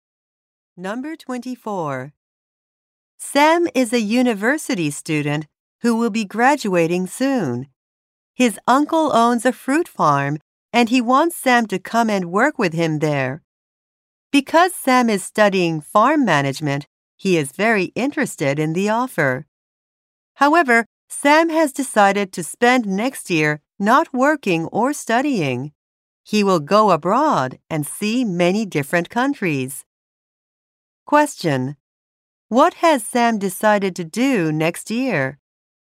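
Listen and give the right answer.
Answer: Travel abroad to many countries.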